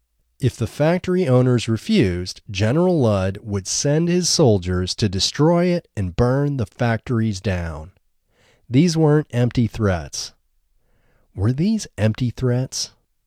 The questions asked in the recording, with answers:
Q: Were these empty threats?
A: No, these weren't empty threats.